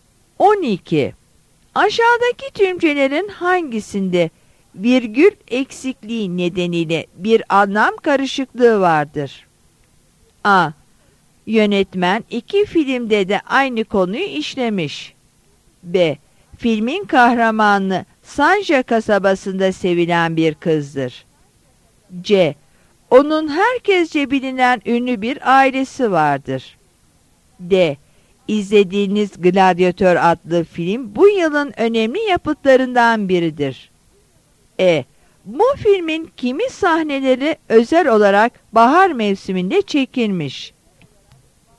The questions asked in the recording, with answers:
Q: Aşağıdaki tümcelerin hangisinde virgül eksikliği nedeniyle bir anlam karışıklığı vardır?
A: Yanıt B'dir.